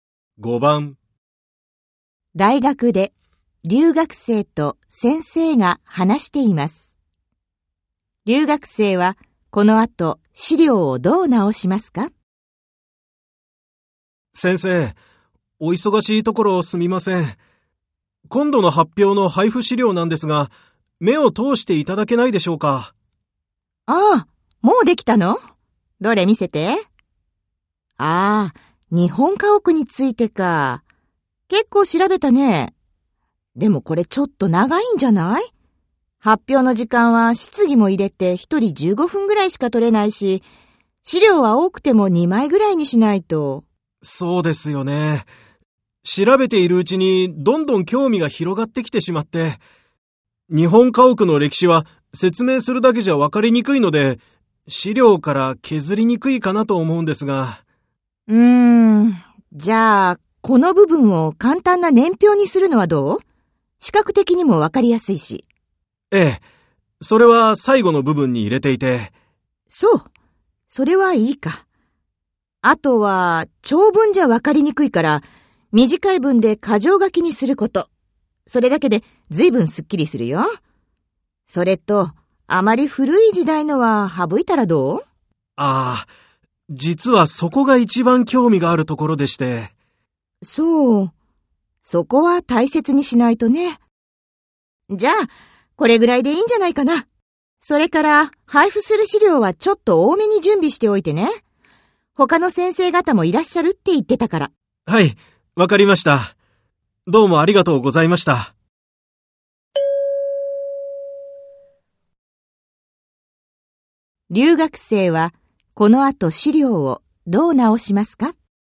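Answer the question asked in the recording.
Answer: 長文を短い文の箇条書きにする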